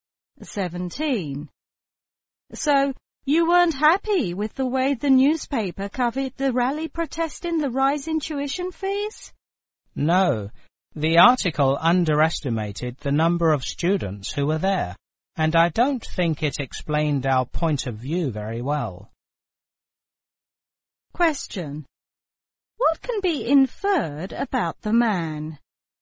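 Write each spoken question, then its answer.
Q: What can be inferred about the man?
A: He took part in the rally against the tuition increase.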